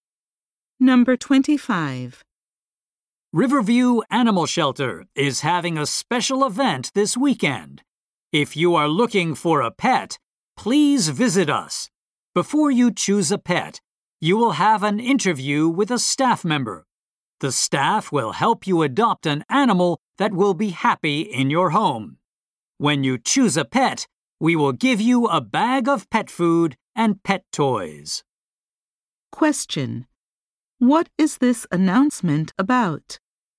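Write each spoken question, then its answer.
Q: What is this announcement about?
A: A pet adoption event at an animal shelter this weekend.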